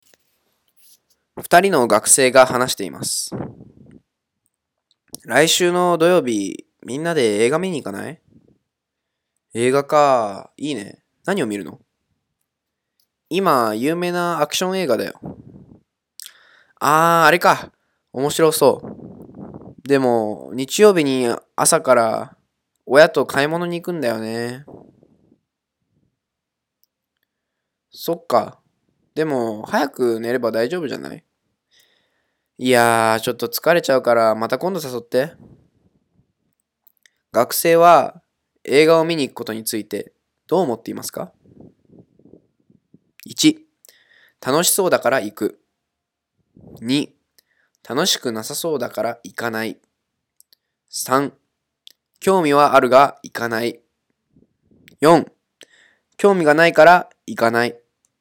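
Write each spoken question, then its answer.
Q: 学生は映画を見に行くことについてどう思っていますか?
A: 3: 興味はあるが行かない。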